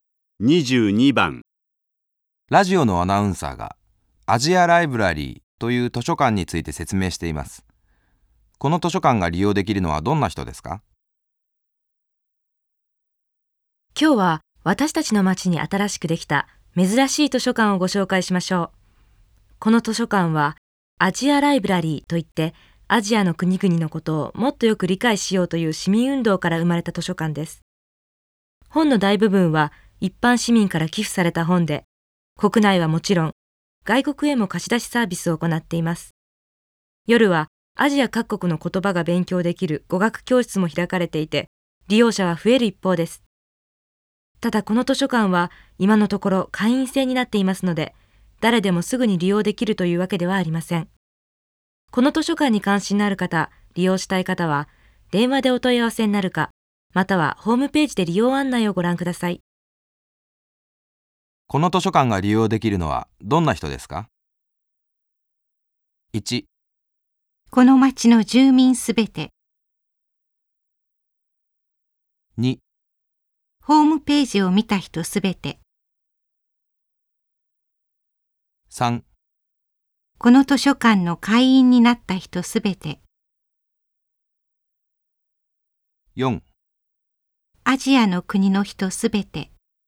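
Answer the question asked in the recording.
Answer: 3: この図書館の会員になった人すべて。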